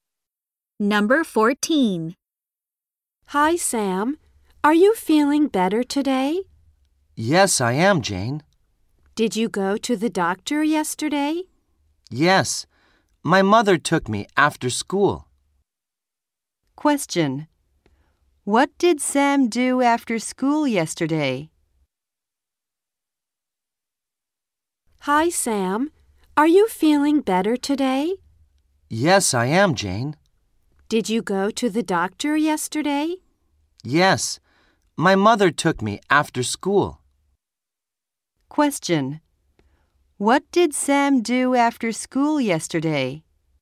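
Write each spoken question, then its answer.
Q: What did Sam do after school yesterday?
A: He went to the doctor.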